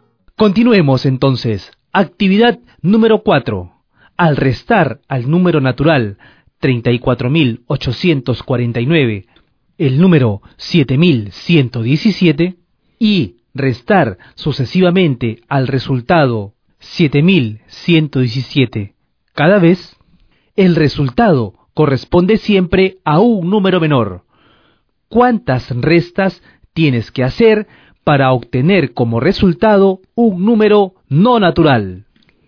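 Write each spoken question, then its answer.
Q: ¿Cuántas restas tienes que hacer para obtener como resultado un número no natural?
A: 5 restas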